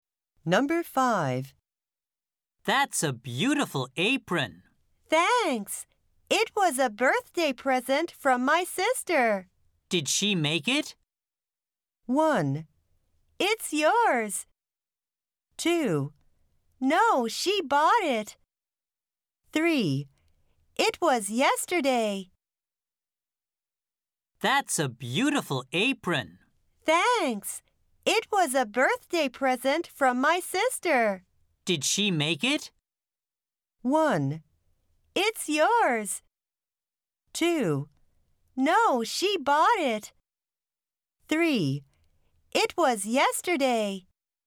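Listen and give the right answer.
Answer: 2: No, she bought it.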